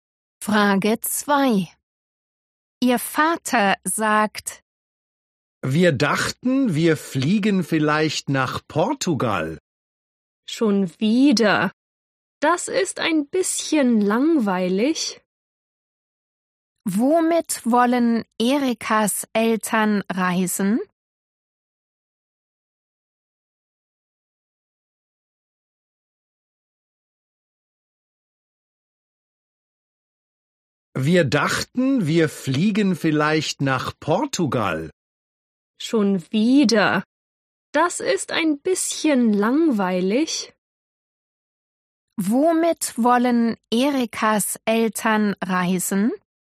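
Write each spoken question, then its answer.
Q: Womit wollen Erikas Eltern reisen?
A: mit dem Flugzeug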